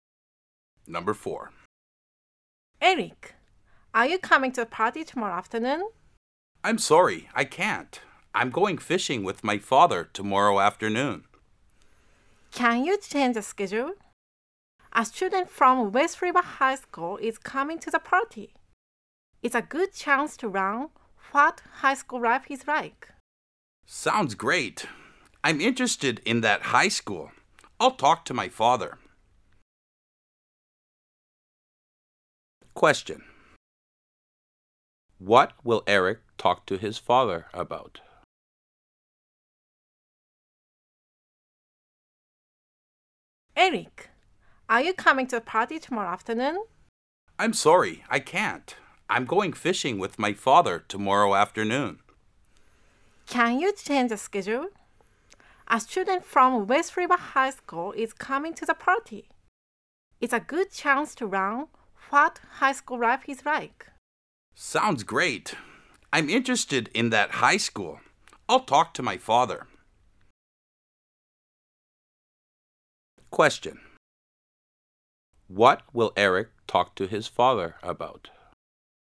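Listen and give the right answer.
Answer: Changing the fishing schedule so he can go to the party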